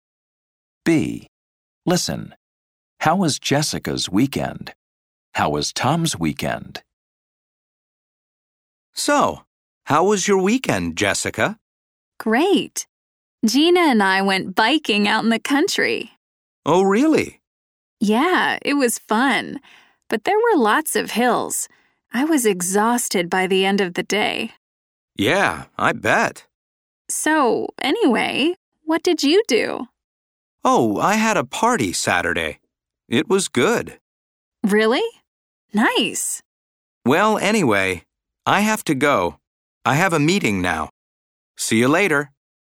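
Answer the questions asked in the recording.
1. Great, fun but tiring; she went biking in the country with Gina and was exhausted.
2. Good; he had a party on Saturday.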